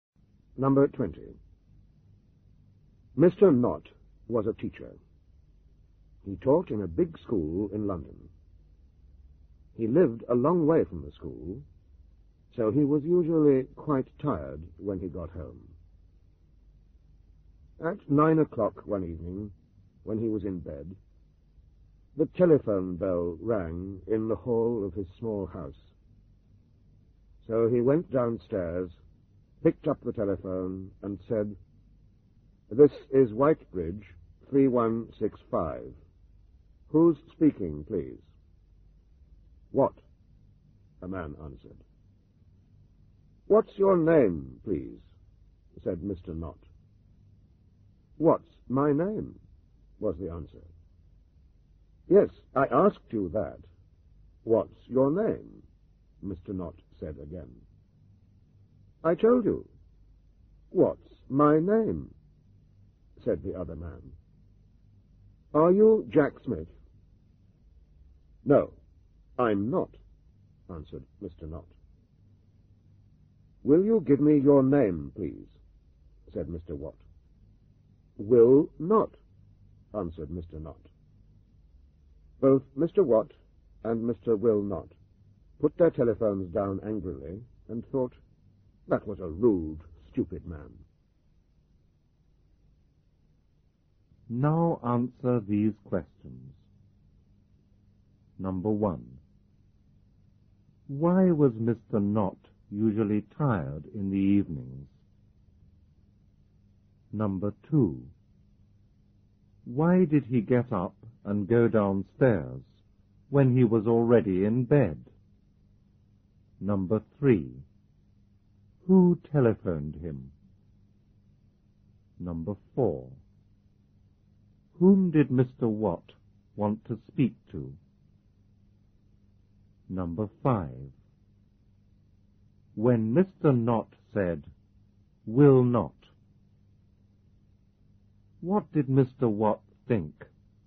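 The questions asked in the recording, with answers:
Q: Why was Mr. Knott usually tired in the evenings?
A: Because he lived a long way from the school.

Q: Why did he get up and go downstairs when he was already in bed?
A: Because the telephone rang in the hall.

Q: Who telephoned him?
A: Mr. Watt

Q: Whom did Mr. Watt want to speak to?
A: Jack Smith

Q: When Mr. Knott said, "Will not," what did Mr. Watt think?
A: That he refused to give his name; that he was a rude, stupid man.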